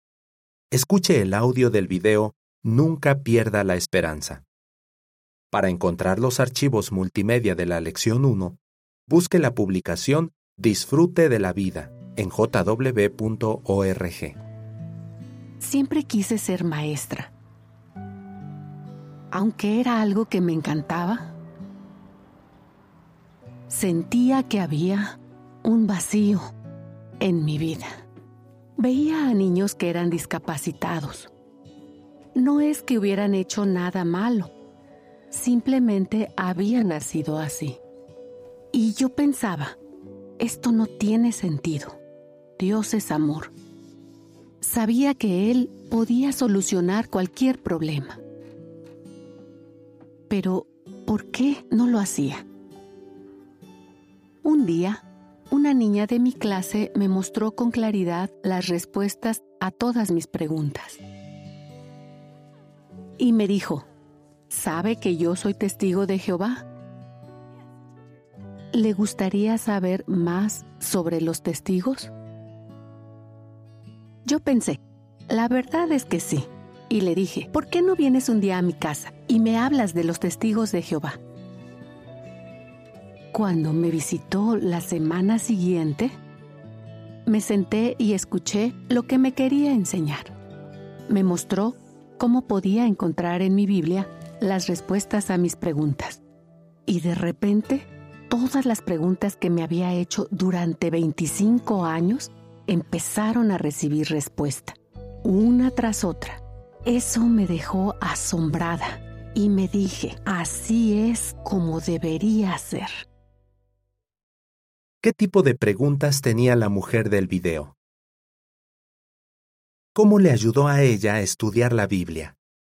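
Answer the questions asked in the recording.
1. Por qué Dios, que es amor, no soluciona problemas como el de niños que nacen discapacitados
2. Encontró en la Biblia respuestas a preguntas que tenía desde hacía 25 años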